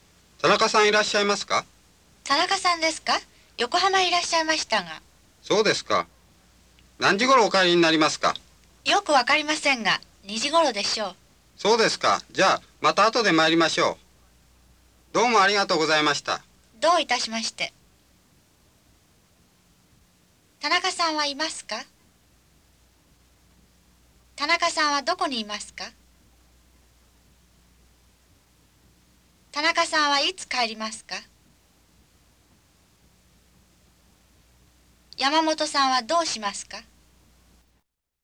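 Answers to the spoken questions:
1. いいえ、いません
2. 横浜にいます
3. 2時頃
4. また後で来ます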